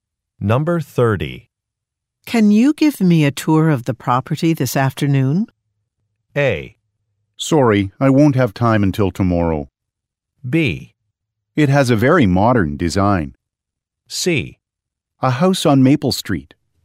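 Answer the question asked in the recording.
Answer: A: Sorry, I won't have time until tomorrow.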